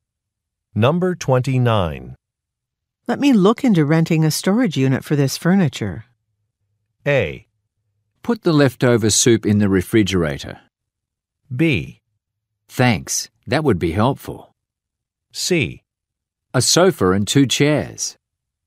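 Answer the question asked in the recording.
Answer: B: Thanks, that would be helpful.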